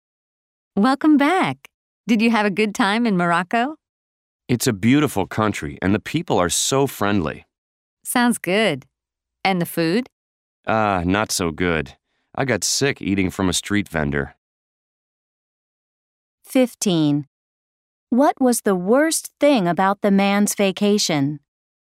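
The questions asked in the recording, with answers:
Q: What was the worst thing about the man's vacation?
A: The food; he got sick eating from a street vendor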